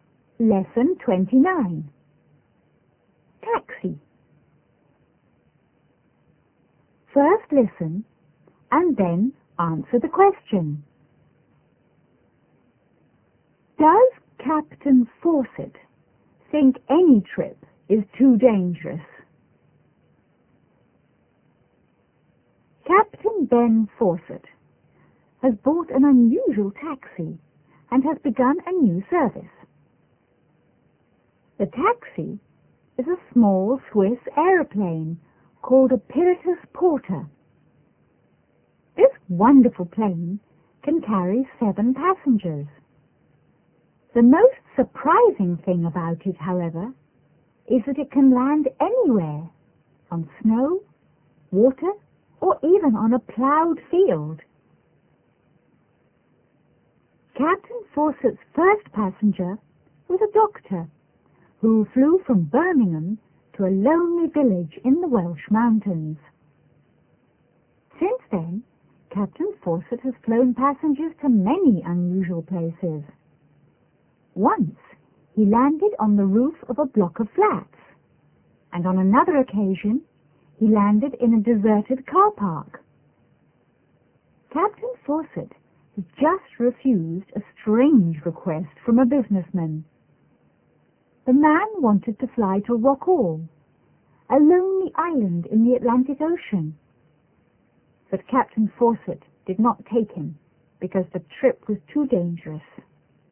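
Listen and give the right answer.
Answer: Yes, he refused to fly a businessman to Rockall because the trip was too dangerous.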